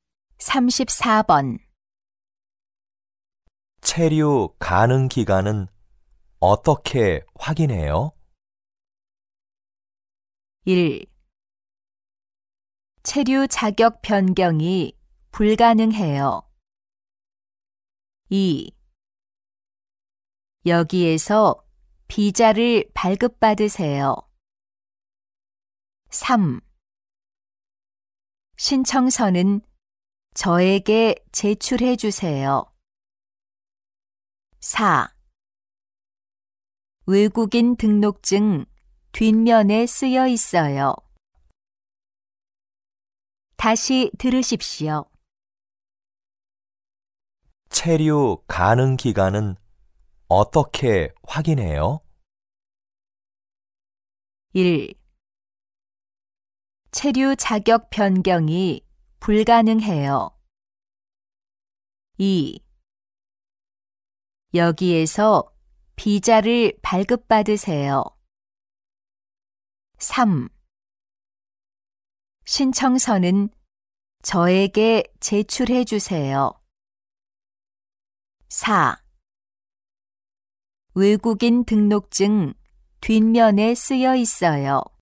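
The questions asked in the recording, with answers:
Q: 체류 가능 기간은 어떻게 확인해요?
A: 4: 외국인 등록증 뒷면에 쓰여 있어요.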